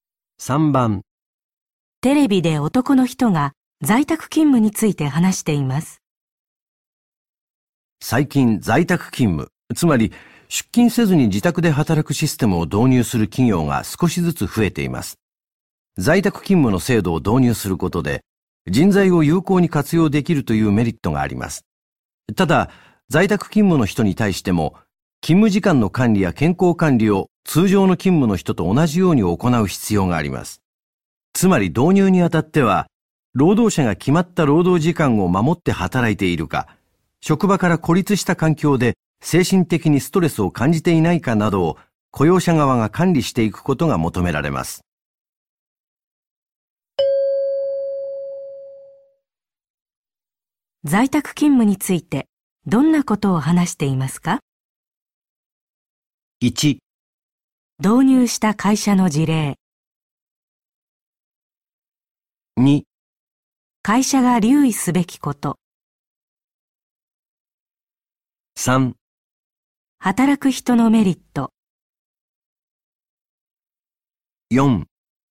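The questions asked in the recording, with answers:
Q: 在宅勤務についてどんなことを話していますか?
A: 2: 会社が留意すべきこと。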